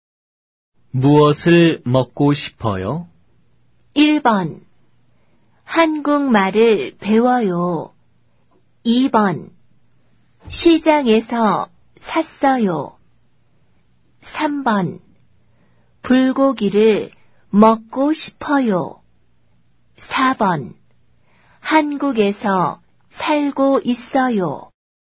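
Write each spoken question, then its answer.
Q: 무엇을 먹고 싶어요?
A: 3: 불고기를 먹고 싶어요.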